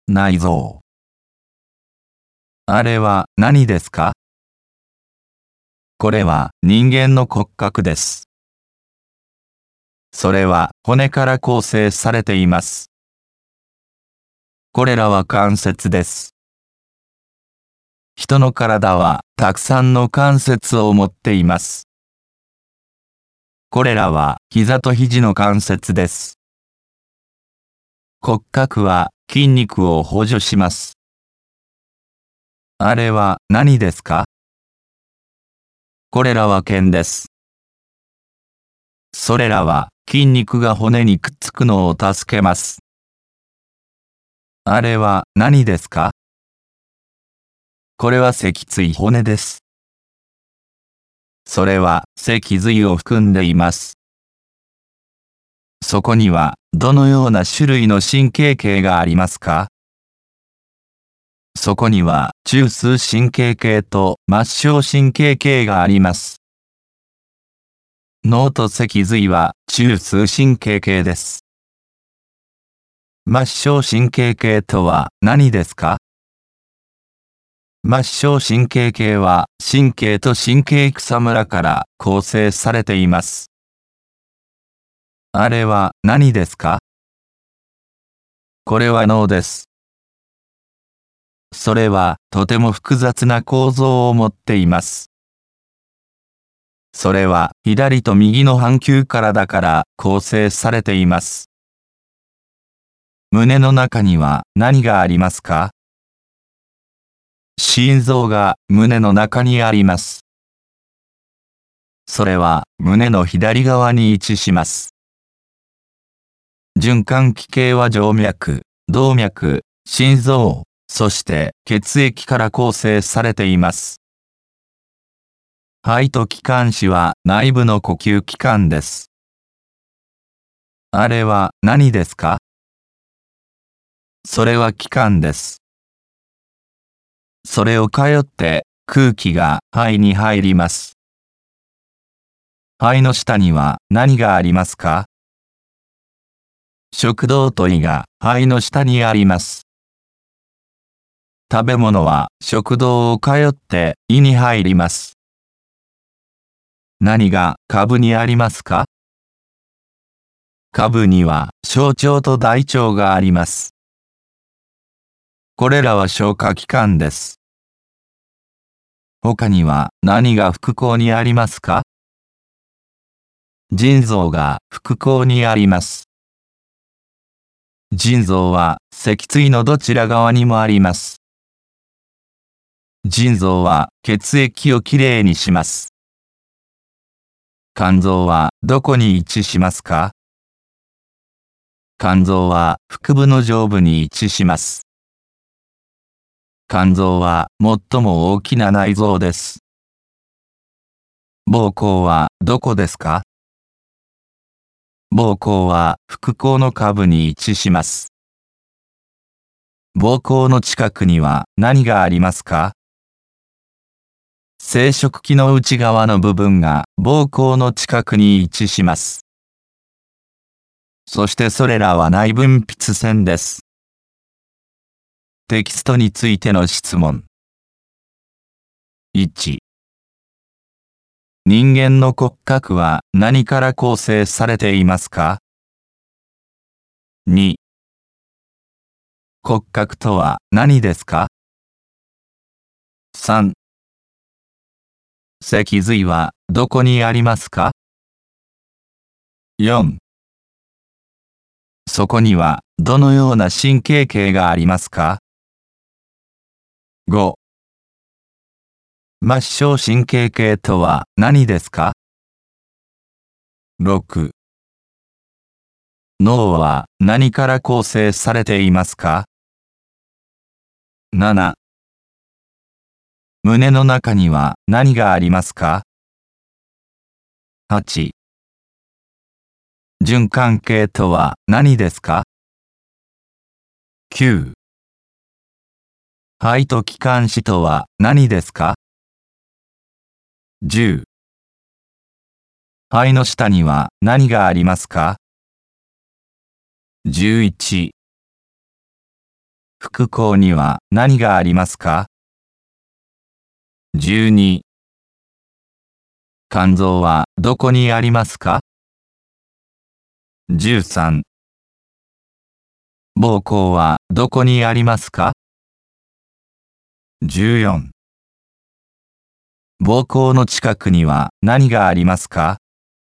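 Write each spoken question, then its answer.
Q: 脊髄はどこにありますか?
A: 脊椎骨の中

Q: そこにはどのような神経系がありますか?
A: 中枢神経系と末梢神経系

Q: 末梢神経系とは何ですか?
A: 神経と神経叢から構成されているもの

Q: 脳は何から構成されていますか?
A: 左と右の半球

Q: 胸の中には何がありますか?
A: 心臓

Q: 循環系とは何ですか?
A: 静脈、動脈、心臓、血液から構成される系

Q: 肺と気管支とは何ですか?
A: 内部の呼吸器官

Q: 肺の下には何がありますか?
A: 食道と胃

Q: 副交には何がありますか?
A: 腎臓

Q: 肝臓はどこにありますか?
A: 腹部の上部

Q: 膀胱はどこにありますか?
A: 腹腔の下部

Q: 膀胱の近くには何がありますか?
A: 生殖器の内側の部分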